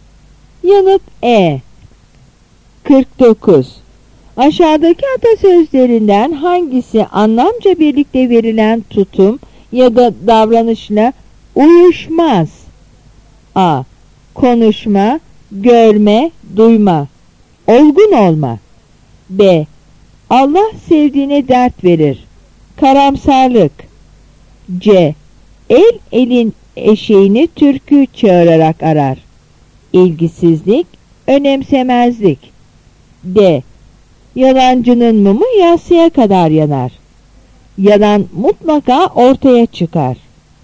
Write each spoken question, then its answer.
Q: Aşağıdaki atasözlerinden hangisi anlamca birlikte verilen tutum ya da davranışla uyuşmaz?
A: Yanıt B.